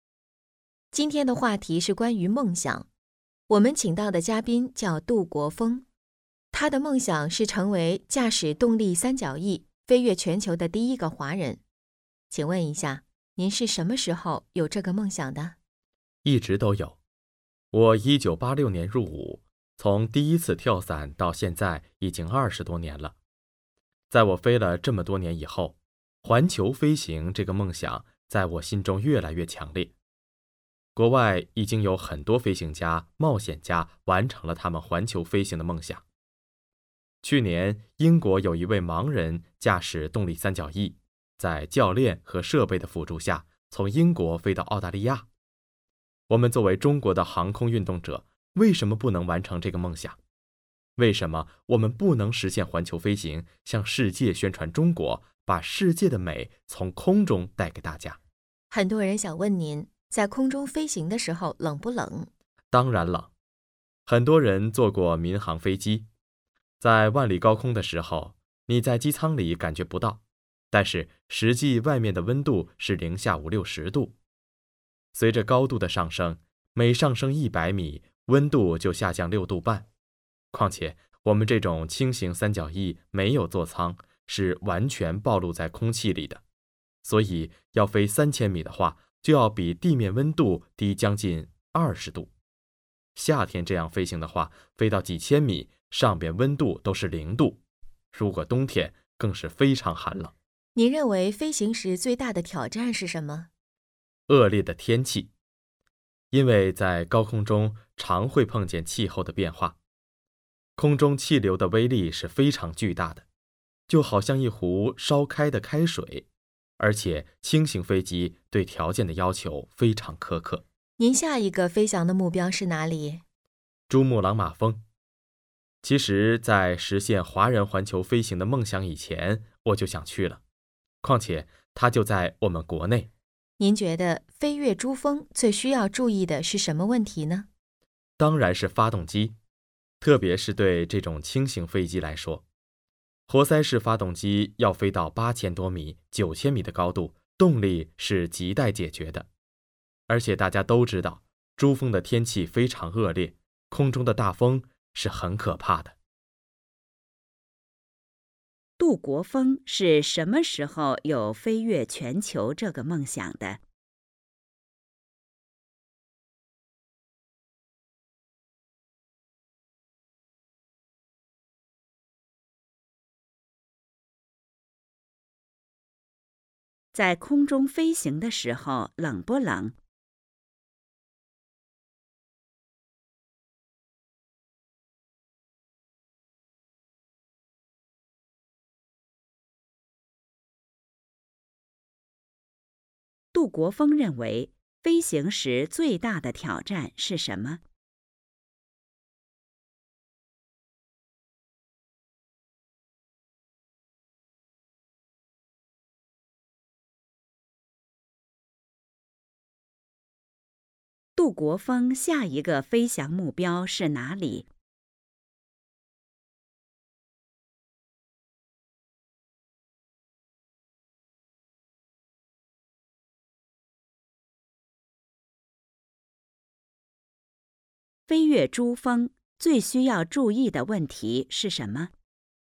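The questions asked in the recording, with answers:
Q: 杜国峰是什么时候有飞越全球这个梦想的?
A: 一直都有,飞了多年后越来越强烈

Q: 在空中飞行的时候冷不冷?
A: 当然冷

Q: 杜国峰认为飞行时最大的挑战是什么?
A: 恶劣的天气

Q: 杜国峰下一个飞翔目标是哪里?飞越珠峰最需要注意的问题是什么?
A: 珠穆朗玛峰;发动机(动力)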